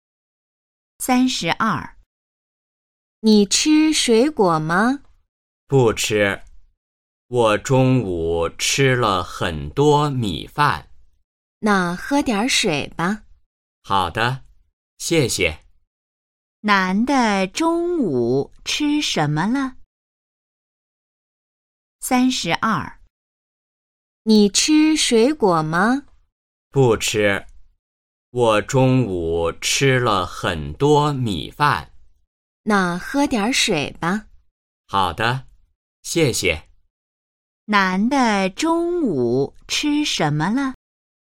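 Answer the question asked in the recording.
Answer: 米饭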